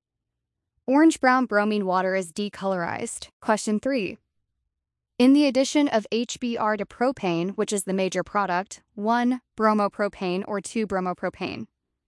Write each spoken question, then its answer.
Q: In the addition of HBr to propane, which is the major product, 1 bromopropane or 2 bromopropane?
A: 2 bromopropane because it forms via the more stable secondary carbocation.